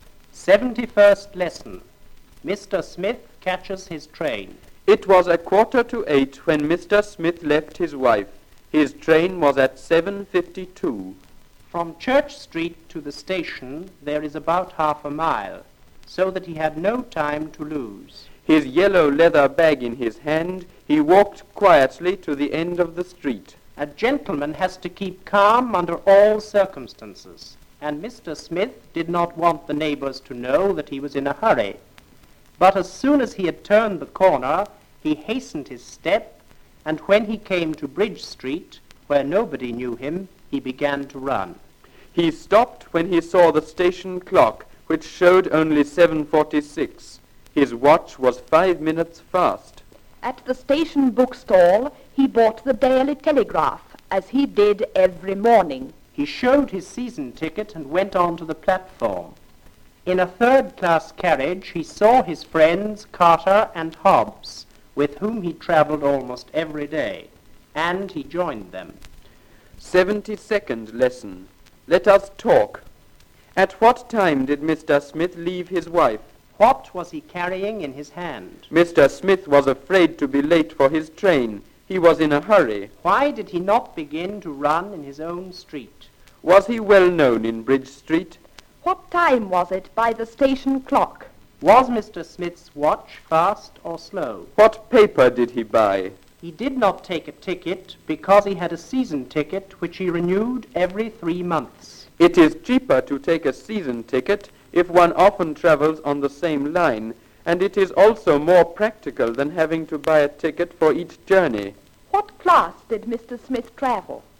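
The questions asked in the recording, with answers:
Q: At what time did Mr. Smith leave his wife?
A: At 7:45

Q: What was he carrying in his hand?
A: His yellow leather bag

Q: Why did he not begin to run in his own street?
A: He did not want the neighbors to know he was in a hurry

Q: Was he well known in Bridge Street?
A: No, nobody knew him there

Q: What time was it by the station clock?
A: 7:46

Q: Was Mr. Smith's watch fast or slow?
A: Fast, by 5 minutes

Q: What paper did he buy?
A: The Daily Telegraph

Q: What class did Mr. Smith travel?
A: Third class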